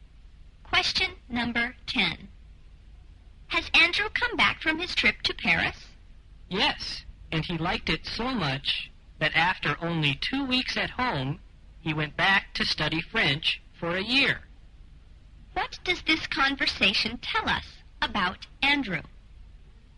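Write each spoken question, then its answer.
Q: What does this conversation tell us about Andrew?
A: He is now in Paris, studying French for a year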